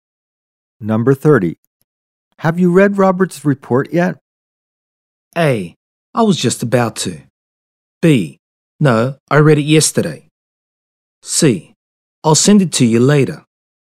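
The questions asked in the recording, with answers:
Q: Have you read Robert's report yet?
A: A: I was just about to.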